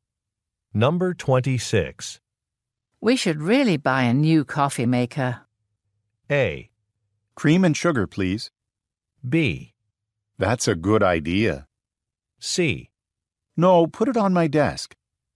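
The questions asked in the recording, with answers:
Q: We should really buy a new coffee maker.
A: B: That's a good idea.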